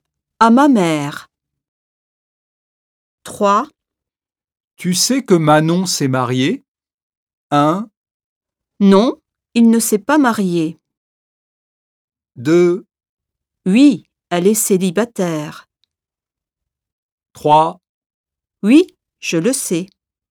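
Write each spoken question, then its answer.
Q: Tu sais que Manon s'est mariée?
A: 3: Oui, je le sais.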